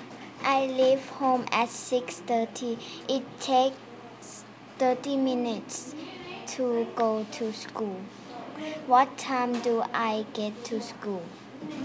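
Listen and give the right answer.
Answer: 7:00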